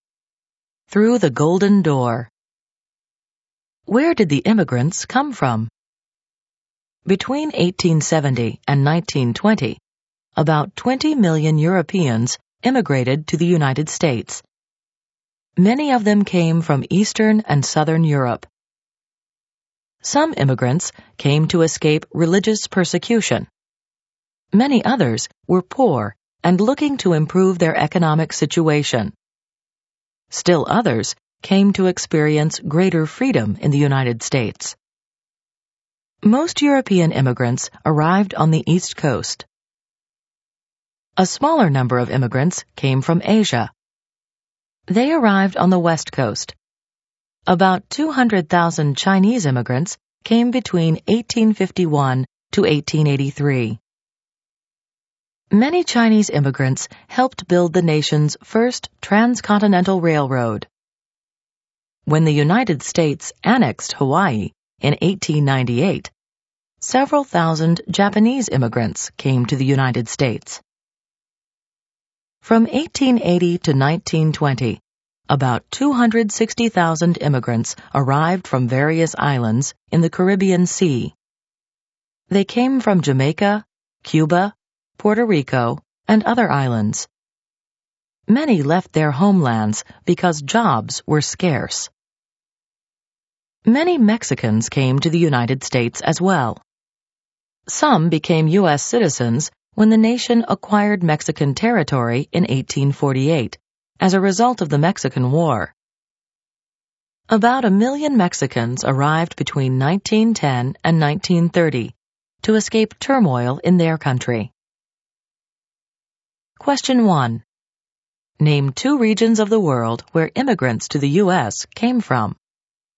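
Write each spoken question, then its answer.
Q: Name two regions of the world where immigrants to the U.S. came from.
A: Any two of: Europe (Eastern and Southern), Asia, the Caribbean, Mexico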